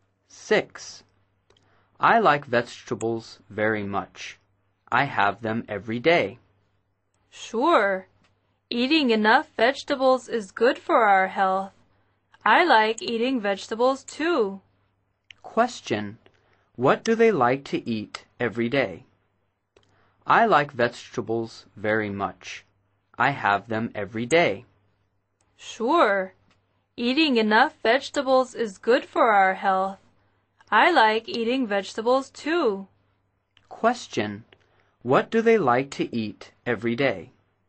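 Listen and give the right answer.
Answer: Vegetables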